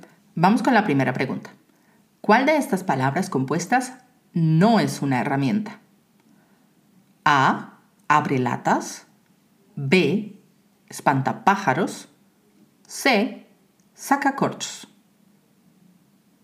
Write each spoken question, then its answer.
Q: ¿Cuál de estas palabras compuestas no es una herramienta?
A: La respuesta correcta es B espantapájaros.